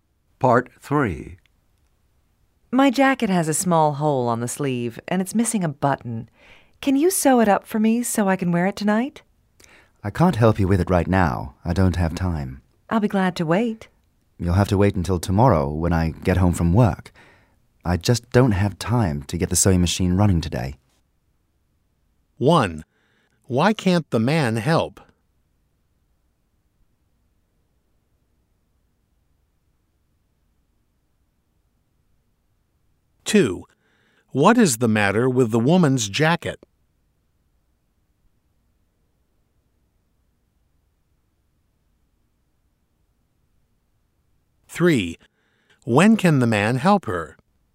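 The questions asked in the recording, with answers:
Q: Why can't the man help?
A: He doesn't have time.

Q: What is the matter with the woman's jacket?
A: It has a small hole on the sleeve and is missing a button.

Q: When can the man help her?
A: Tomorrow, when he gets home from work.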